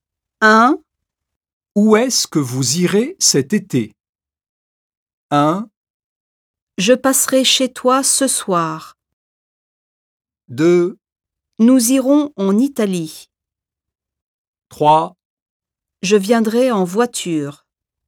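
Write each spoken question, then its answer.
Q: Où est-ce que vous irez cet été?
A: 2: Nous irons en Italie.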